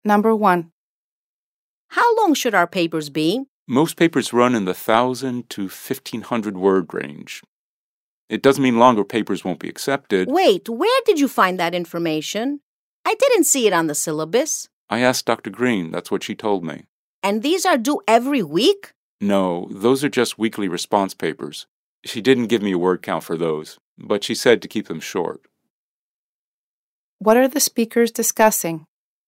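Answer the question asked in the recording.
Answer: How long their papers for Dr. Green's class should be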